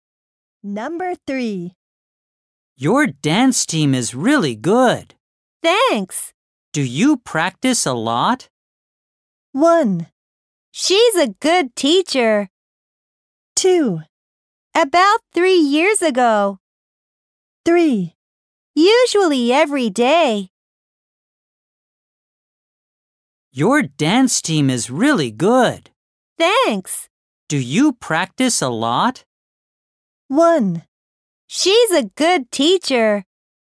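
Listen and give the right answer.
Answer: 3: Usually every day.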